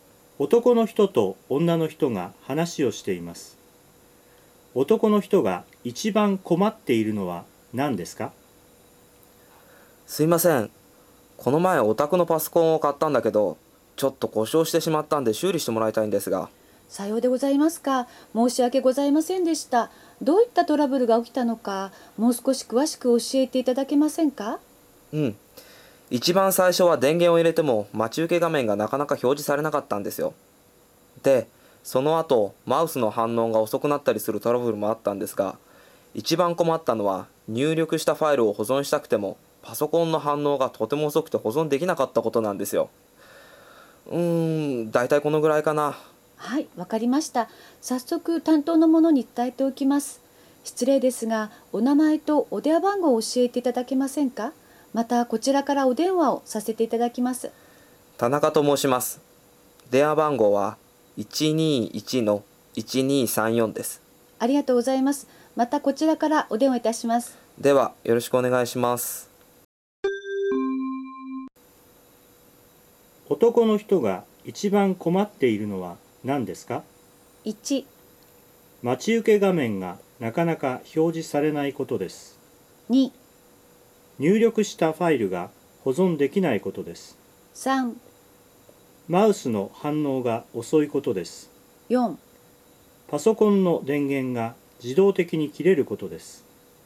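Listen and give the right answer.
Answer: 2: 入力したファイルが保存できないことです。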